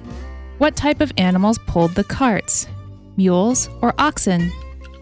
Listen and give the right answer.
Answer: The answer is mules.